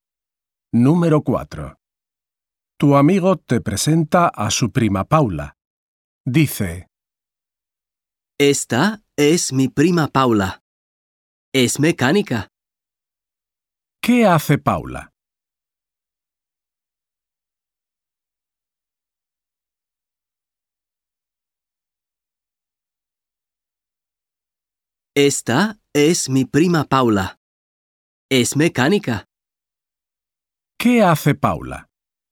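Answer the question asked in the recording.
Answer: Es mecánica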